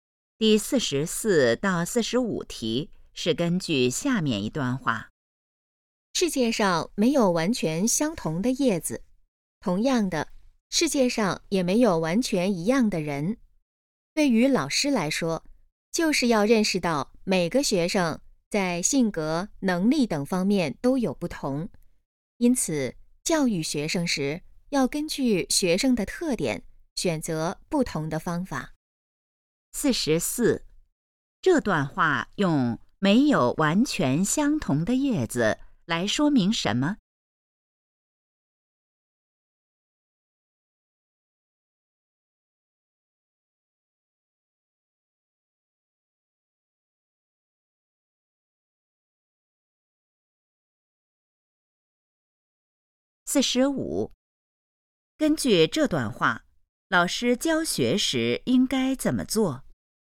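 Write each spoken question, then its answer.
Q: 这段话用没有完全相同的叶子来说明什么?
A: 每个人都不一样

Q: 根据这段话,老师教学时应该怎么做?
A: 根据学生的特点选择不同的方法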